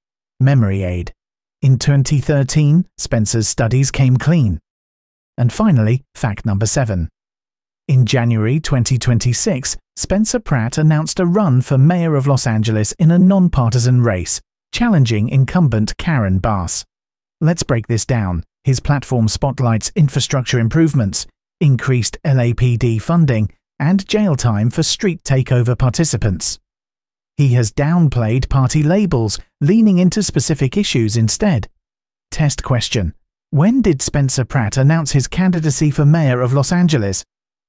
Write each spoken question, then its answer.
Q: When did Spencer Pratt announce his candidacy for mayor of Los Angeles?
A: Correct answer, 2026.